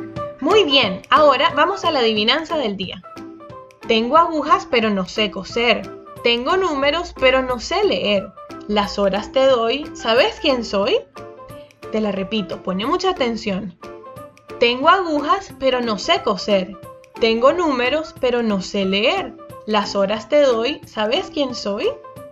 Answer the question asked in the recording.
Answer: Muy bien, la respuesta es el reloj.